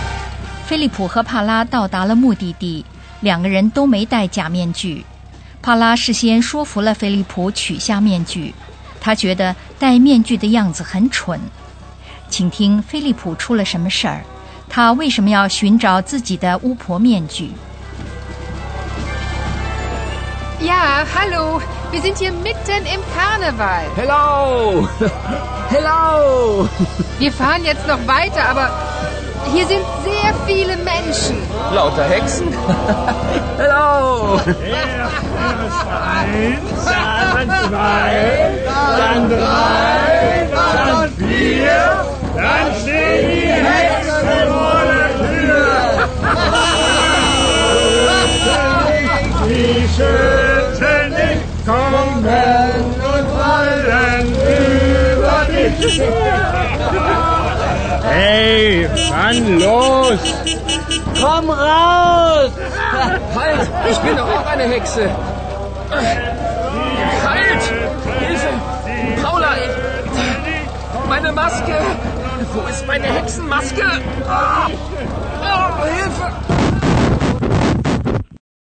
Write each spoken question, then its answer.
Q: 请听菲利普出了什么事儿,他为什么要寻找自己的巫婆面具?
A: 那样的话,他还可以更有说服力地声明他也是巫婆,至少他自己是这么看的。